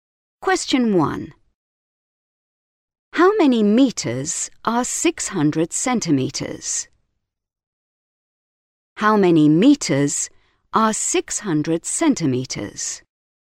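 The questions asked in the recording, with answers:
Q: How many meters are 600 centimeters?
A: 6 metres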